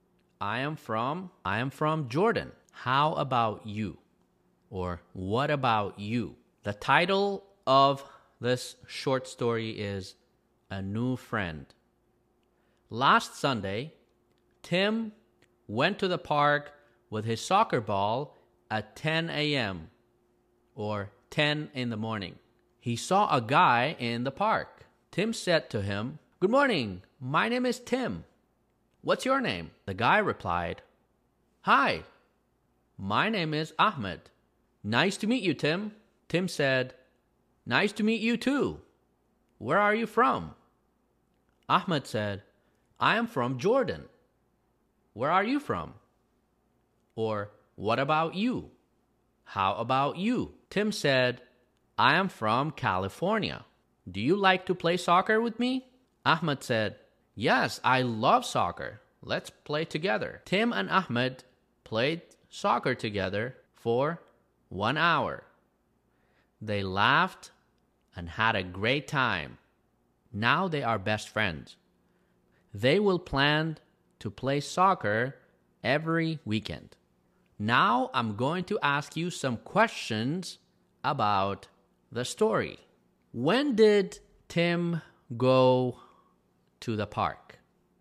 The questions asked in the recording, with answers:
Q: When did Tim go to the park?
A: On Sunday. Last Sunday.